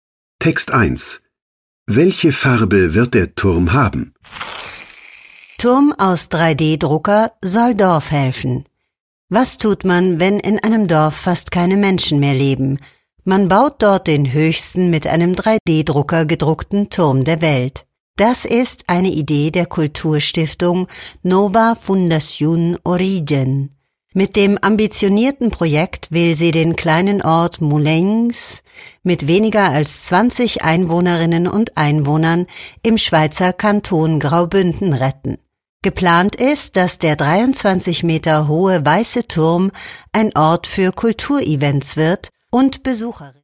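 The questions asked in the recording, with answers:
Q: Welche Farbe wird der Turm haben?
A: weiß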